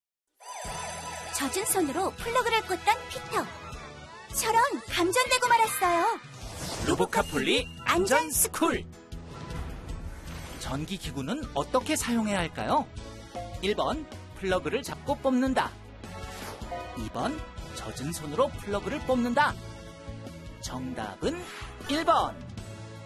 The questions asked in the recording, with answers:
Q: 전기기구는 어떻게 사용해야 할까요?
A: 정답은 1번.